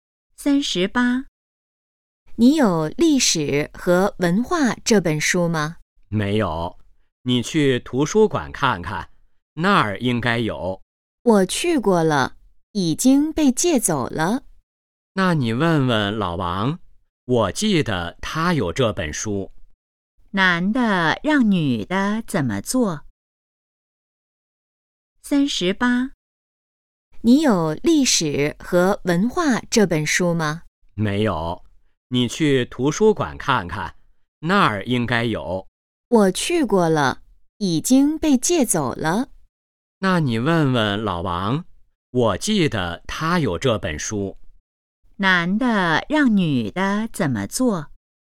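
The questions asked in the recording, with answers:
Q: 男的让女的怎么做?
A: 去问问老王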